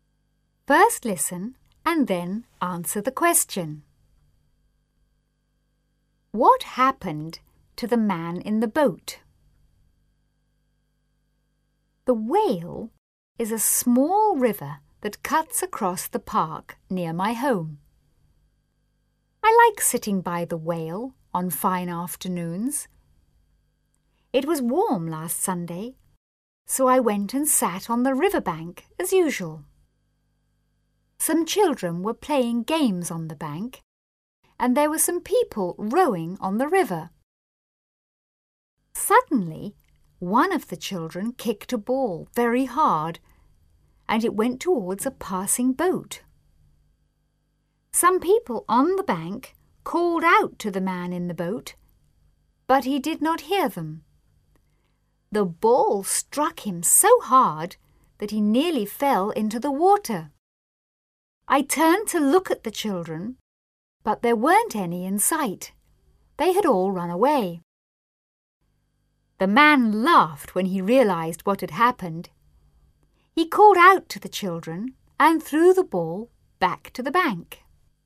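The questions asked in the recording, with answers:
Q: What happened to the man in the boat?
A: A ball kicked by a child struck him so hard that he nearly fell into the water.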